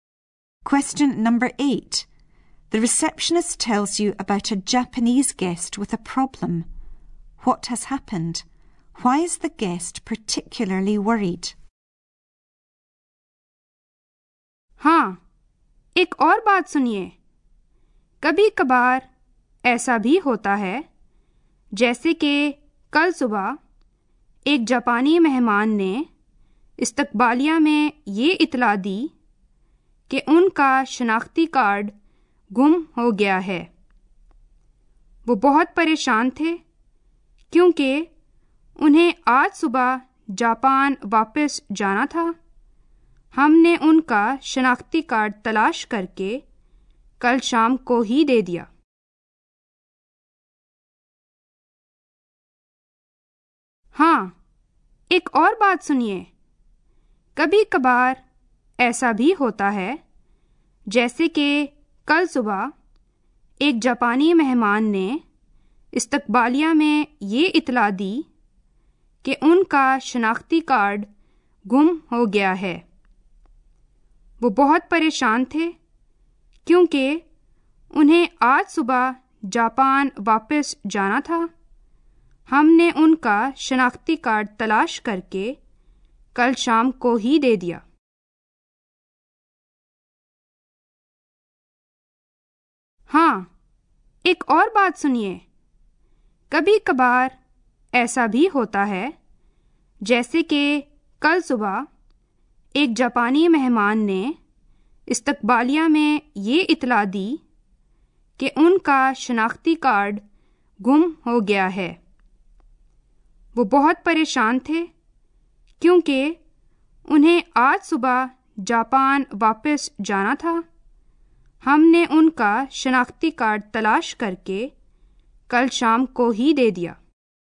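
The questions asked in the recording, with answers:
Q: What has happened? Why is the guest particularly worried?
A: He lost his identity card; he had to return to Japan this morning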